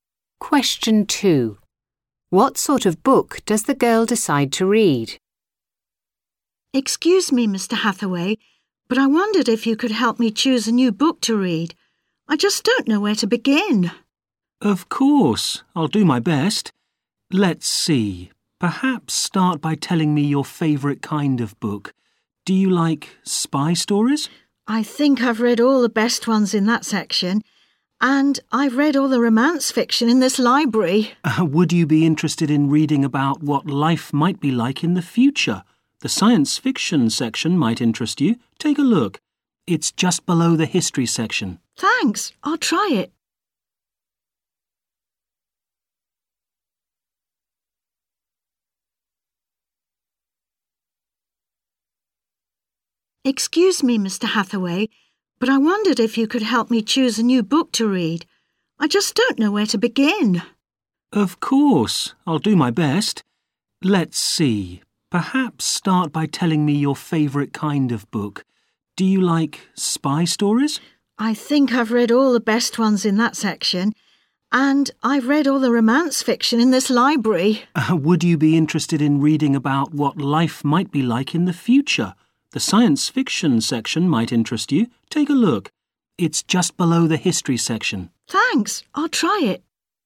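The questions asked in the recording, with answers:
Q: What sort of book does the girl decide to read?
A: Science fiction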